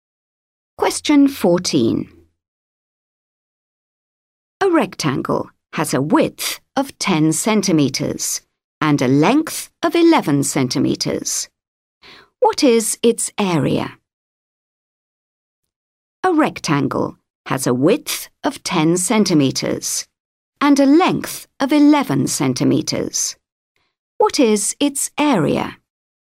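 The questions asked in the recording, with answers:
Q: What is its area?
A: 110 square centimeters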